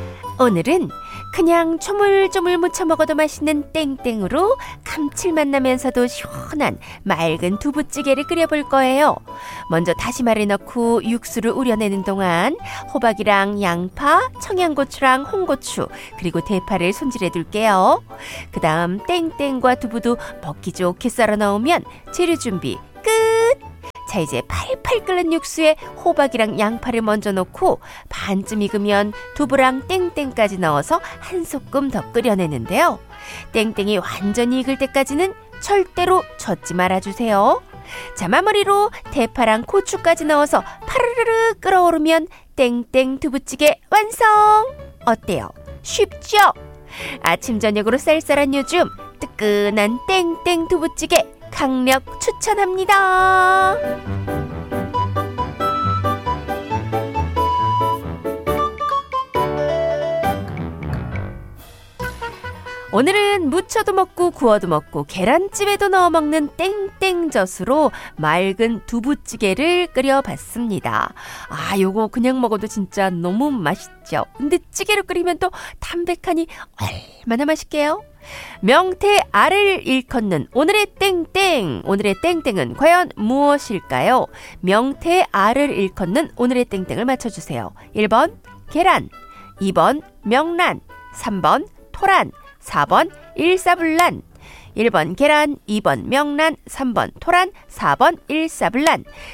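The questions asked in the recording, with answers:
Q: 명태 알을 일컫는 오늘의 땡땡을 맞춰주세요. 1번 계란, 2번 명란, 3번 토란, 4번 일사불란.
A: 2: 명란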